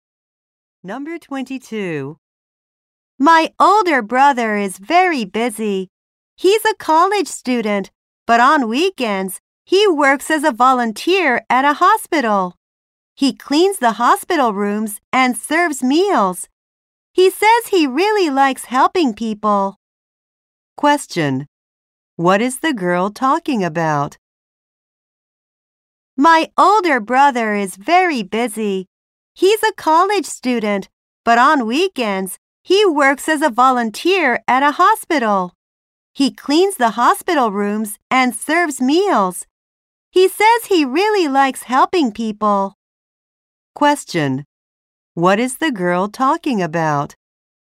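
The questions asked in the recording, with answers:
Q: What is the girl talking about?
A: Her brother's volunteer work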